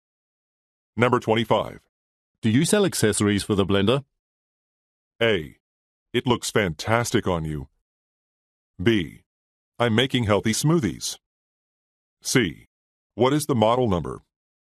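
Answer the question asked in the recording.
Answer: C: What is the model number?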